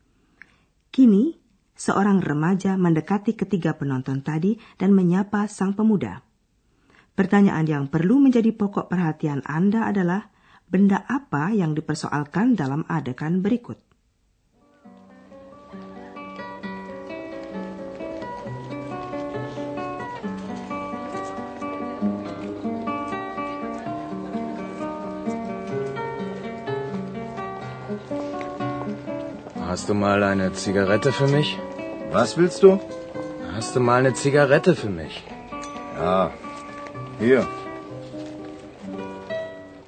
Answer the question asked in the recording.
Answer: Adegan ini berkisar sekitar seorang remaja yang meminta sebatang rokok alias sigaret.